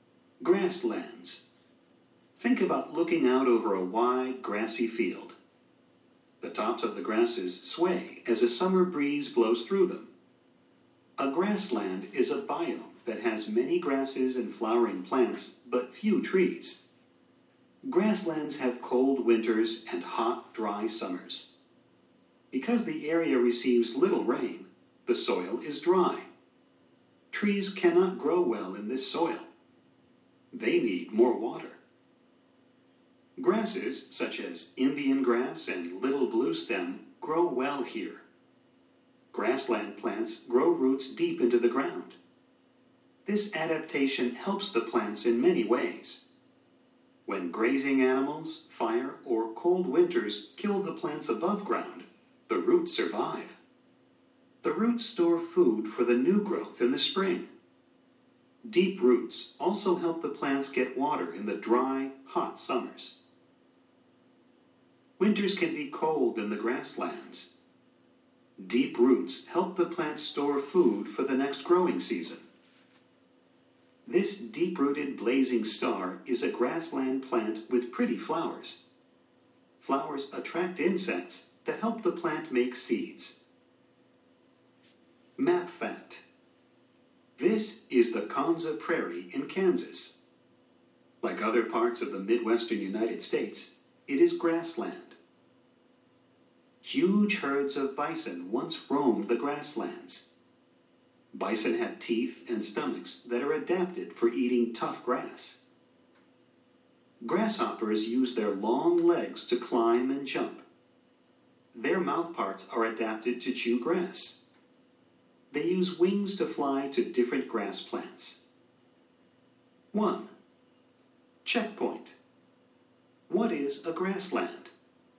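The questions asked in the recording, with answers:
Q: What is a grassland?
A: A biome that has many grasses and flowering plants, but few trees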